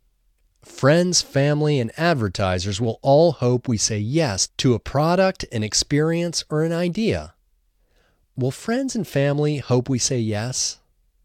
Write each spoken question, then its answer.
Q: Will friends and family hope we say yes?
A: Yes, friends and family will hope we say yes.